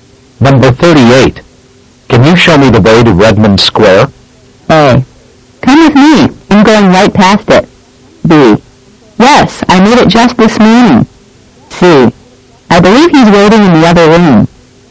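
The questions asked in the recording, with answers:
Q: Can you show me the way to Redmond Square?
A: A: Come with me. I'm going right past it.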